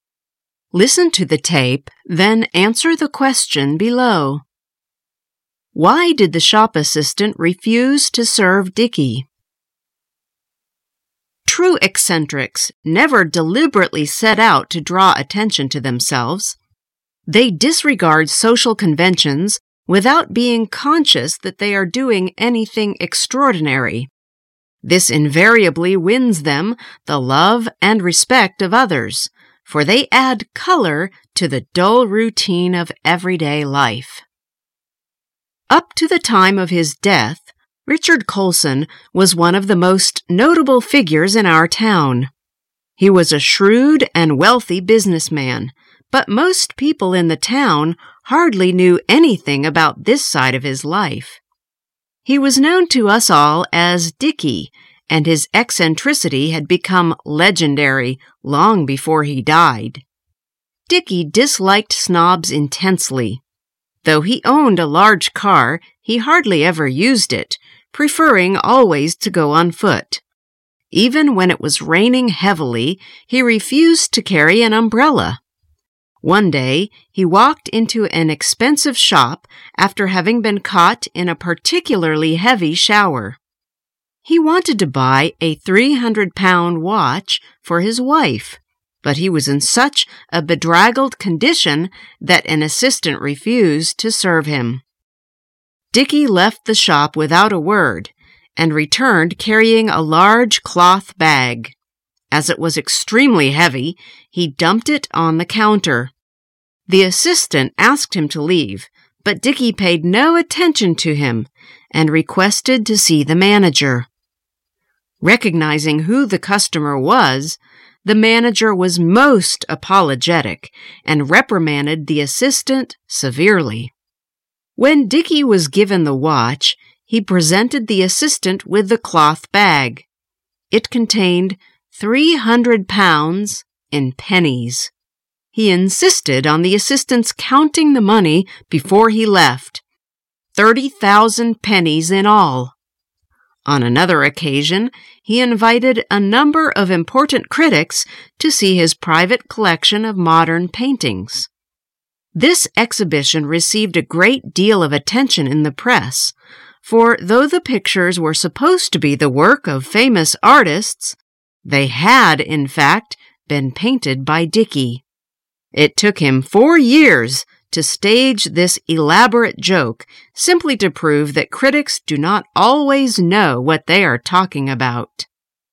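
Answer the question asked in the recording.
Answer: Because he was in a bedraggled condition after being caught in a heavy shower.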